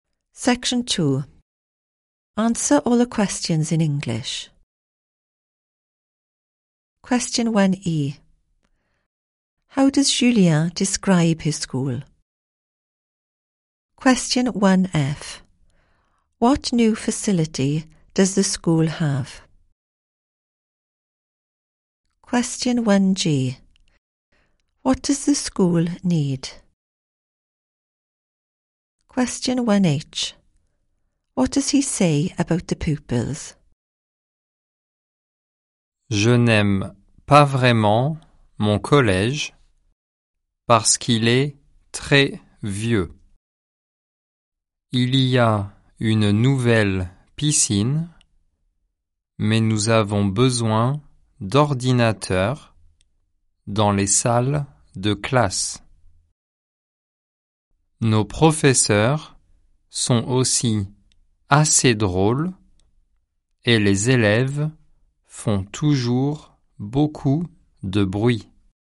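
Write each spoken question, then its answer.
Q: How does Julien describe his school?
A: Very old

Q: What new facility does the school have?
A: A new swimming pool

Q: What does the school need?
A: Computers in the classrooms

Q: What does he say about the pupils?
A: They always make a lot of noise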